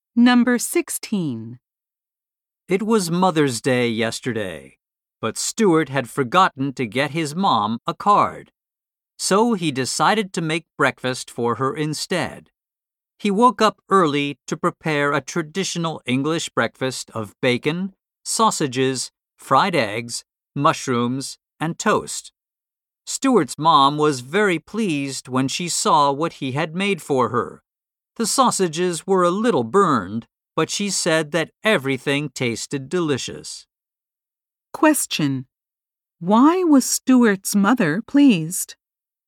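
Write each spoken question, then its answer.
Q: Why was Stuart's mother pleased?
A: Stuart made breakfast for her.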